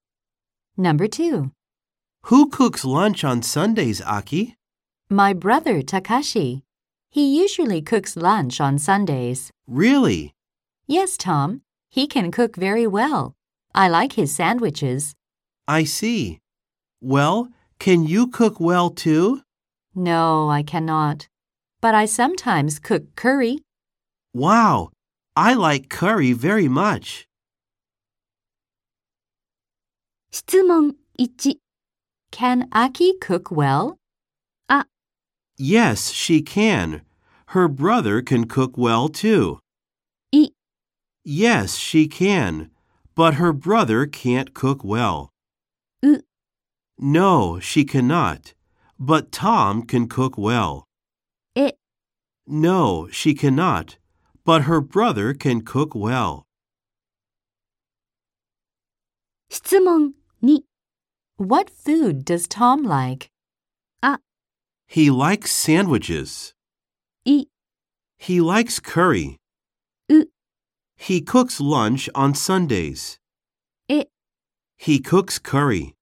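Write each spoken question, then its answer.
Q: Can Aki cook well?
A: エ: No, she cannot, but her brother can cook well.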